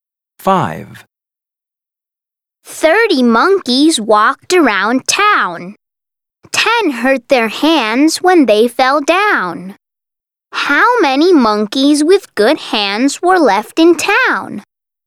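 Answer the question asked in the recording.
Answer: 20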